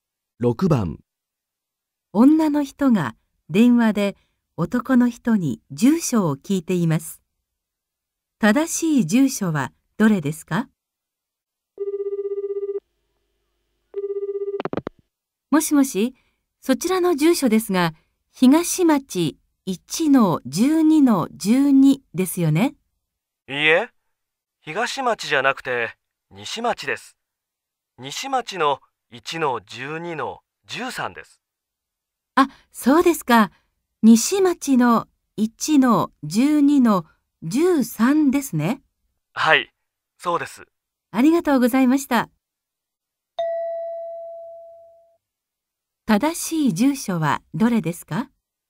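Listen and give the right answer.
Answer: 西町1-12-13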